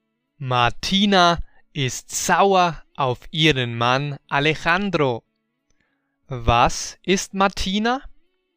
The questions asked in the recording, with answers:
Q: Was ist Martina?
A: Sauer. Sie ist sauer.